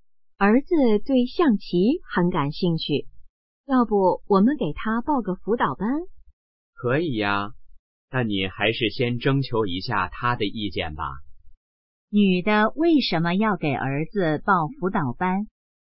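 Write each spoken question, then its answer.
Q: 女的为什么要给儿子报辅导班?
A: 儿子对象棋很感兴趣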